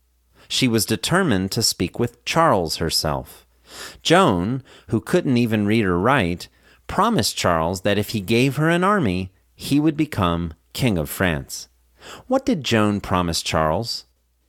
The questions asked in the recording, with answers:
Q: What did Joan promise Charles?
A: Joan promised Charles that if he gave her an army, he would become King of France.